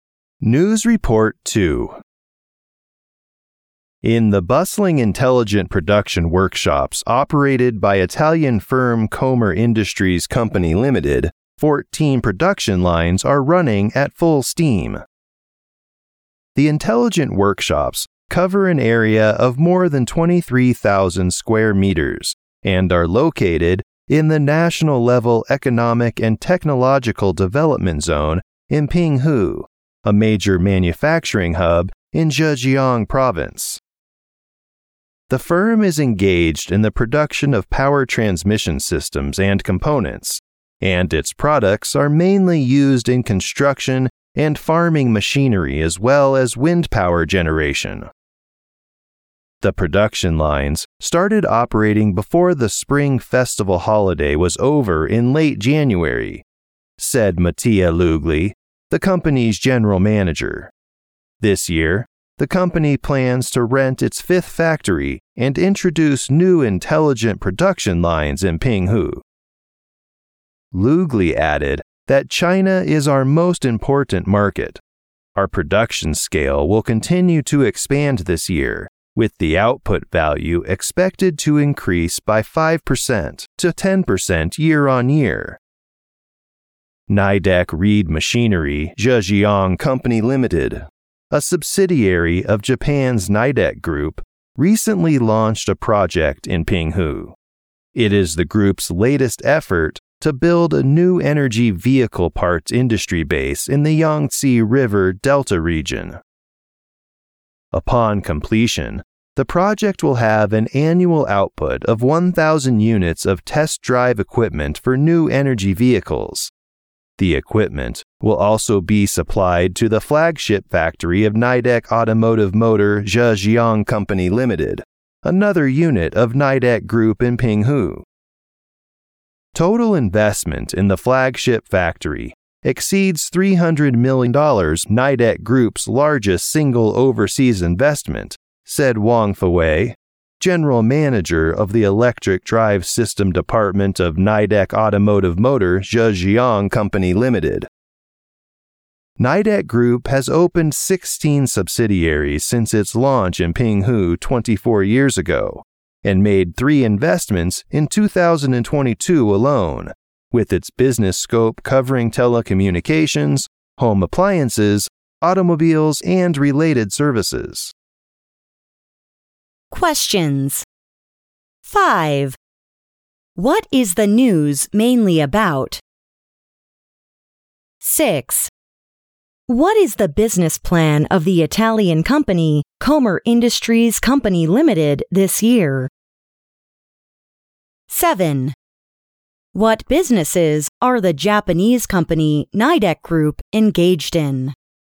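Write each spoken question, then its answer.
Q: What is the business plan of the Italian company, Comer Industries Company Limited, this year?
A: To rent its fifth factory and introduce new intelligent production lines in Pinghu

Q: What businesses are the Japanese company, Nidec Group, engaged in?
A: Telecommunications, home appliances, automobiles, and related services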